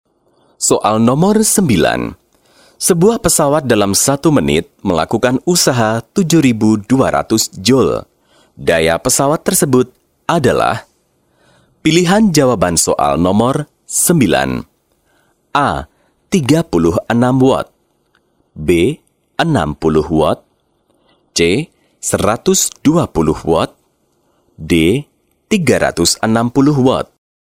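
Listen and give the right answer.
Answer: C: 120 watt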